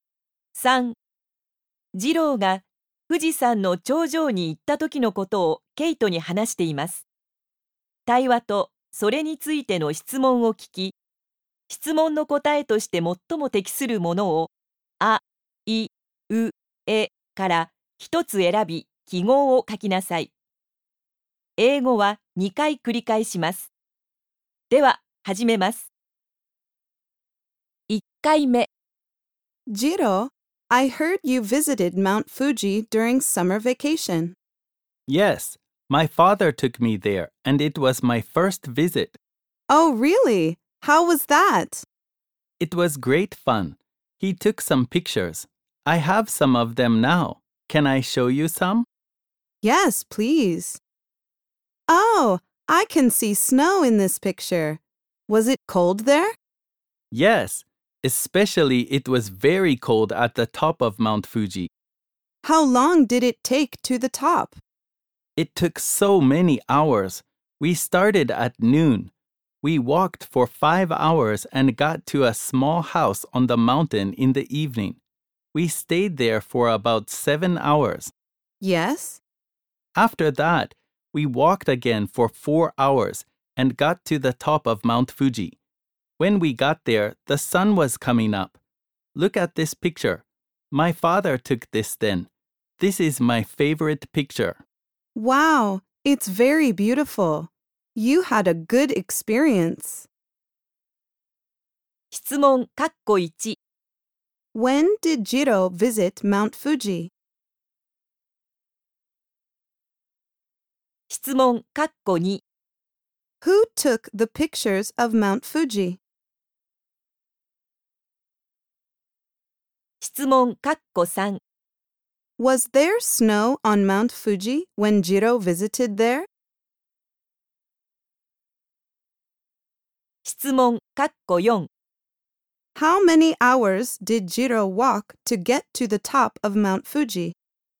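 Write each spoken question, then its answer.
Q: When did Jiro visit Mount Fuji?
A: During summer vacation

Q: Who took the pictures of Mount Fuji?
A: His father

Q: Was there snow on Mount Fuji when Jiro visited there?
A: Yes, there was

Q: How many hours did Jiro walk to get to the top of Mount Fuji?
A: Nine hours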